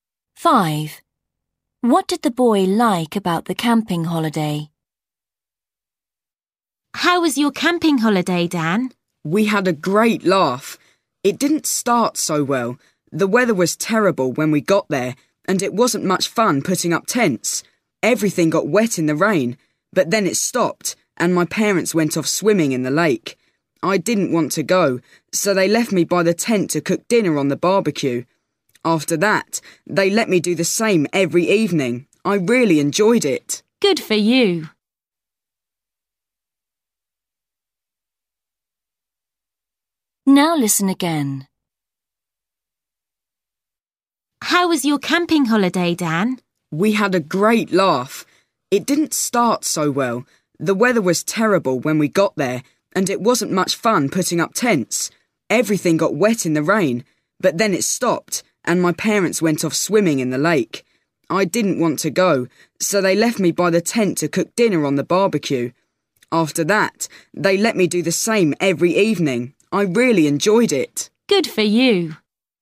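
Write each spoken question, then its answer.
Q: What did the boy like about the camping holiday?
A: cooking dinner on the barbecue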